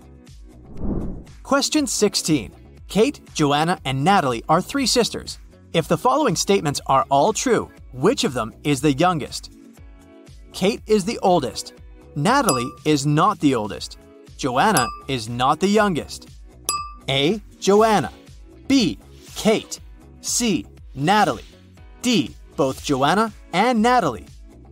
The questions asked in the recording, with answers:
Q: If the following statements are all true, which of them is the youngest?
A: The answer is Natalie.